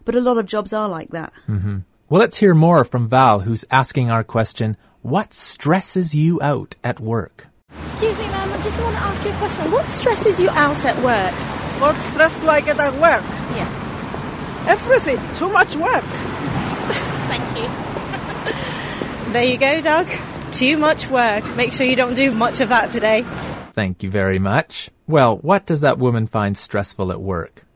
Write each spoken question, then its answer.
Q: Well, what does that woman find stressful at work?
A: Everything, she said.